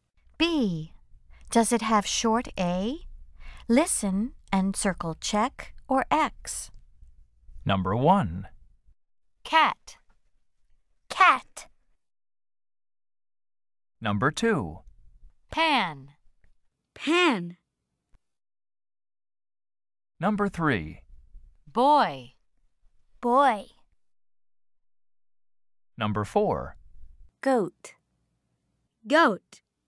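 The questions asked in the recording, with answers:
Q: Goat.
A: No (X): goat has no short A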